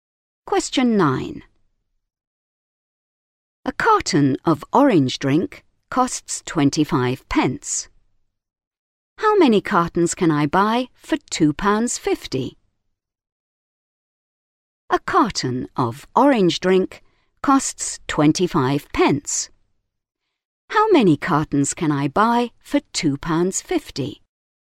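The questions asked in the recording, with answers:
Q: How many cartons can I buy for £2.50?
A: 10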